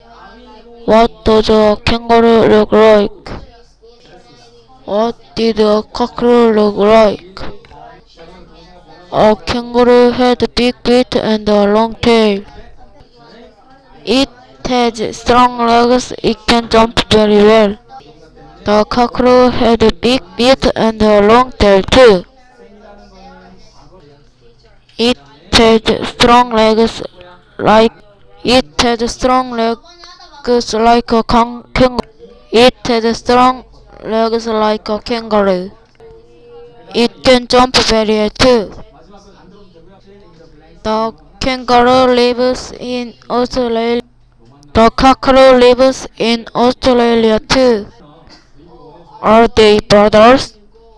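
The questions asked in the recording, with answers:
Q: What does a kangaroo look like?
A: It has big feet, a long tail and strong legs.

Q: What did a cockerel look like?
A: It has big feet, a long tail and strong legs, like a kangaroo.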